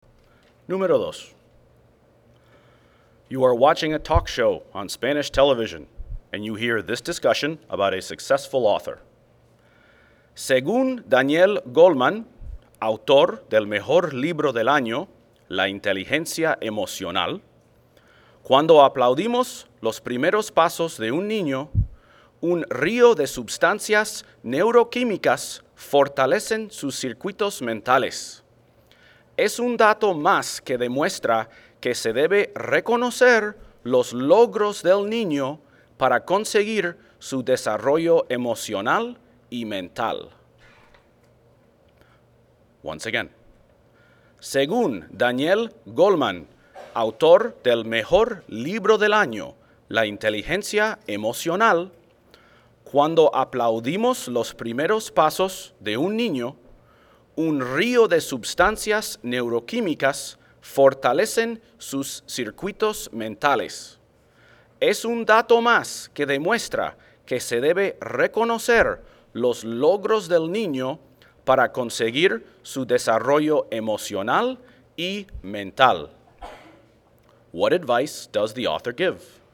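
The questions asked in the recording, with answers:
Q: What advice does the author give?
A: Praise/recognize children's achievements to support their emotional and mental development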